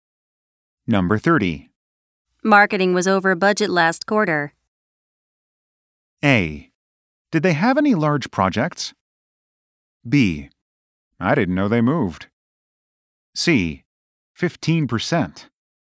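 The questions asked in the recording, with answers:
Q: Marketing was over budget last quarter.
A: A: Did they have any large projects?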